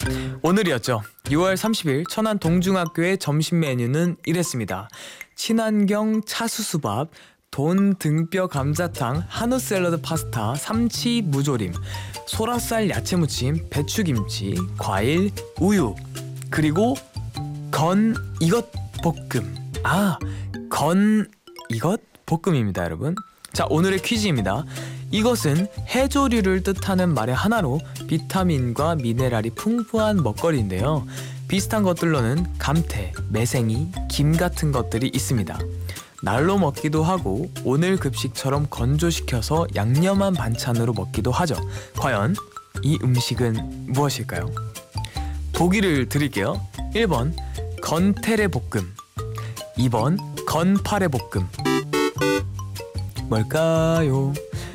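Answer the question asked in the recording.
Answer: 2: 건파레 볶음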